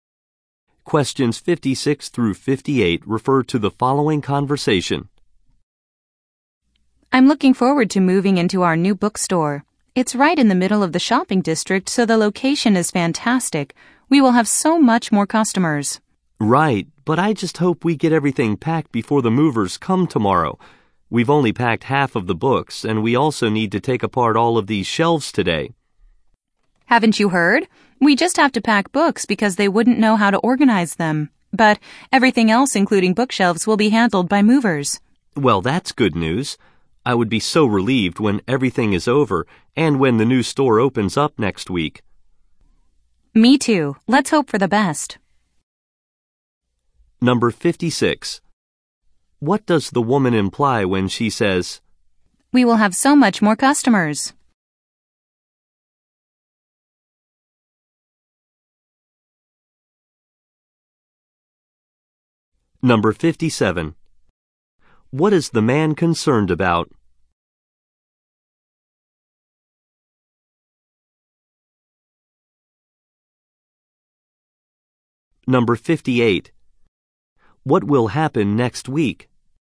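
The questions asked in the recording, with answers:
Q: What does the woman imply when she says,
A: The new location is better for business

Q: What is the man concerned about?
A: Finishing packing before the movers come

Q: What will happen next week?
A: The new store will open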